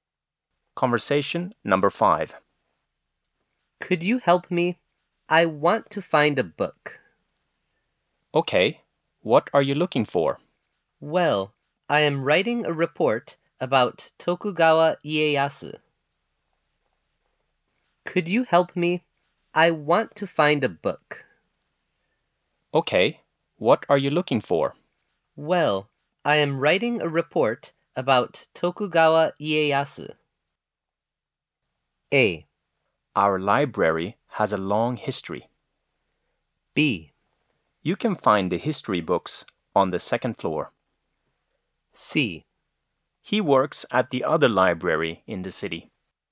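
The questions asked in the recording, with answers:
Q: Well, I am writing a report About Tokugawa Ieyasu.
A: B: You can find the history books on the second floor.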